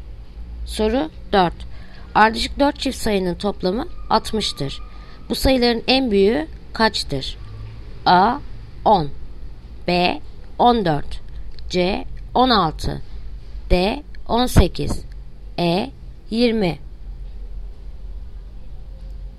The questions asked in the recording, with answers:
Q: Bu sayıların en büyüğü kaçtır?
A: Yanıt Diyarbakır 18.